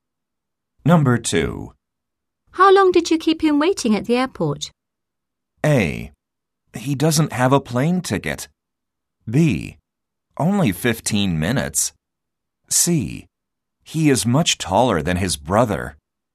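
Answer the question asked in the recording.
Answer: B: Only 15 minutes.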